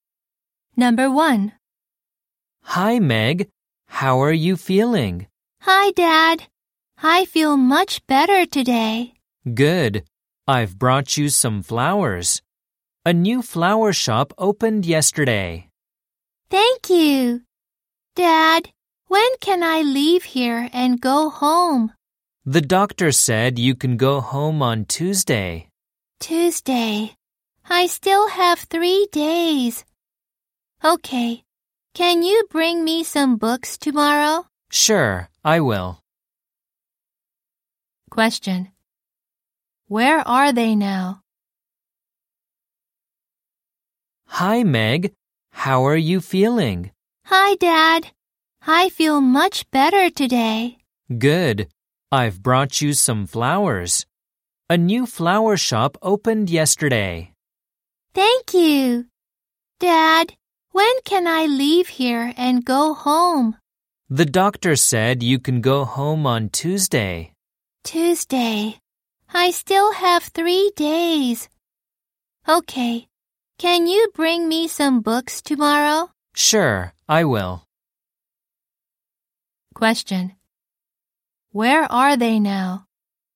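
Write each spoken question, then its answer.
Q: Where are they now?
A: In a hospital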